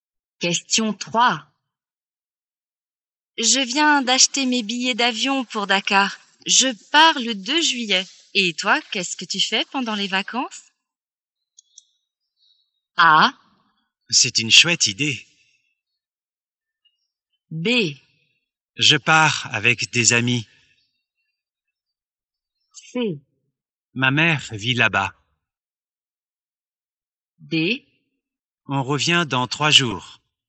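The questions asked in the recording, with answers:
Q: Et toi, qu'est-ce que tu fais pendant les vacances?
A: B: Je pars avec des amis.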